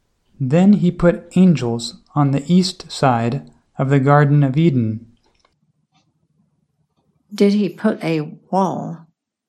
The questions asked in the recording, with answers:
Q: Did he put a wall?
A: No, he put angels.